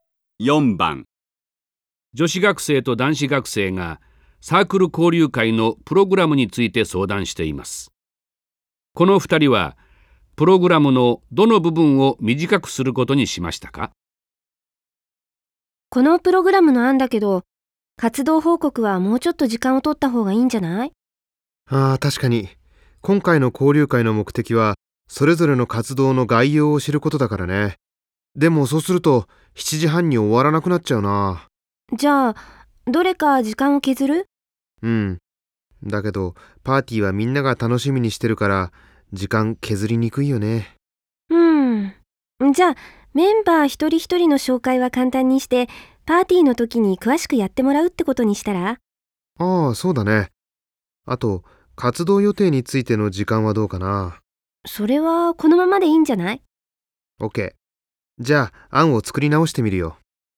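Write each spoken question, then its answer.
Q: この2人はプログラムのどの部分を短くすることにしましたか?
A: メンバー一人一人の紹介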